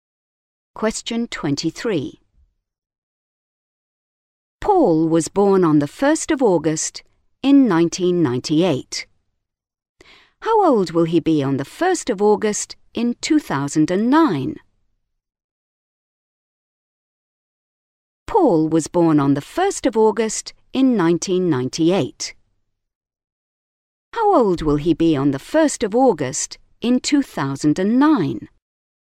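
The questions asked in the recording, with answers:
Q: How old will he be on the 1st of August in 2009?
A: 11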